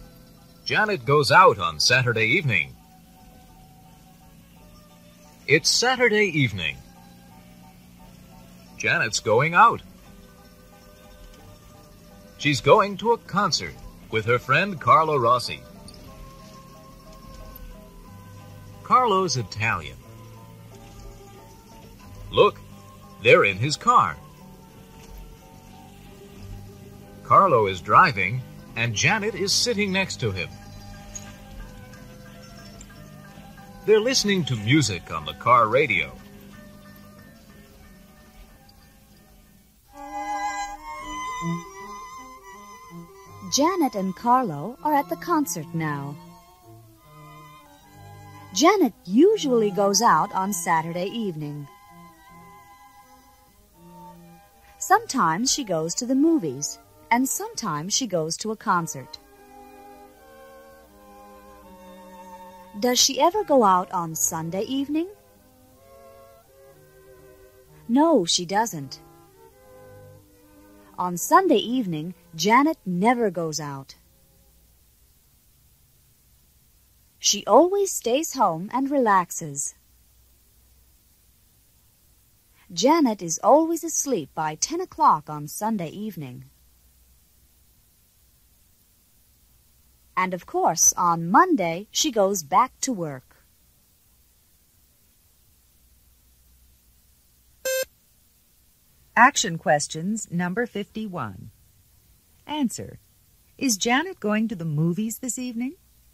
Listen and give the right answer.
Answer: No, she's not.